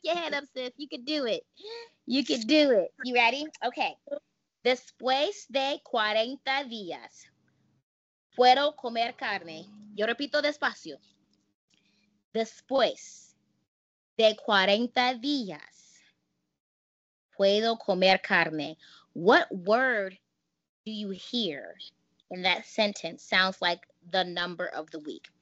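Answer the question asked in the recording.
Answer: 40 (cuarenta)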